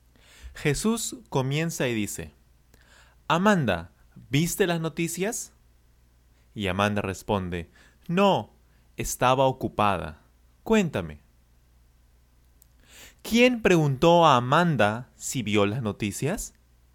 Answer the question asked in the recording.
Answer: Jesús. Jesús preguntó a Amanda si vio las noticias.